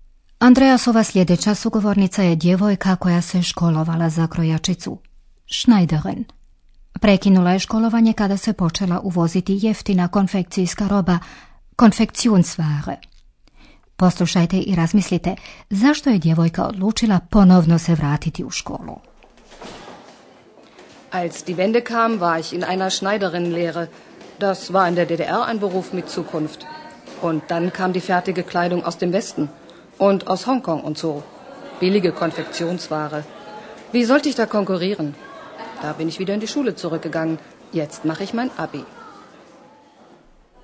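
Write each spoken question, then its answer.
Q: Poslušajte i razmislite zašto je djevojka odlučila ponovno se vratiti u školu.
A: Jer nije mogla konkurirati jeftinoj gotovoj odjeći sa zapada i iz Hongkonga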